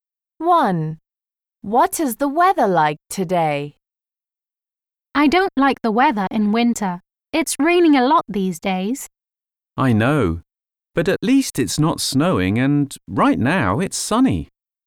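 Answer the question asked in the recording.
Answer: sunny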